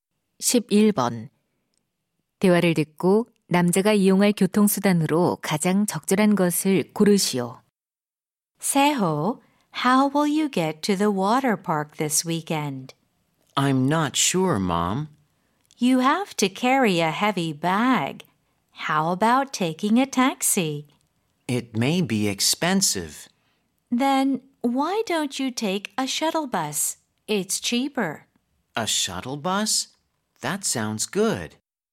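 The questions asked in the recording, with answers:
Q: 대화를 듣고 남자가 이용할 교통수단으로 가장 적절한 것을 고르시오.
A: 셔틀버스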